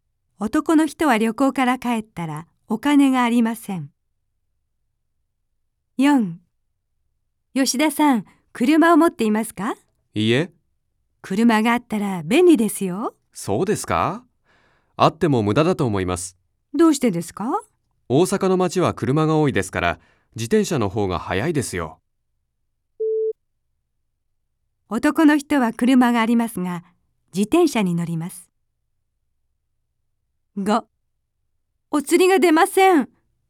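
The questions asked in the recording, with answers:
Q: 男の人は車がありますが、自転車に乗ります。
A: ×(車を持っていない)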